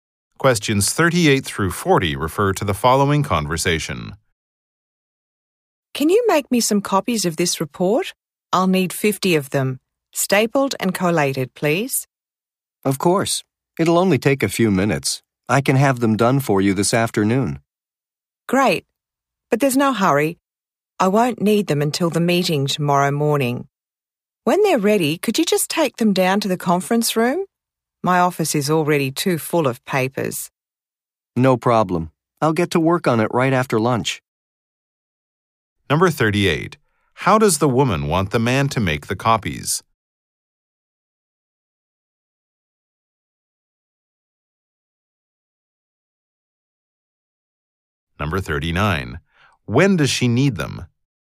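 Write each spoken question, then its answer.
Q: the woman want the man to make the copies?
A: Stapled and collated

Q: When does she need them?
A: Tomorrow morning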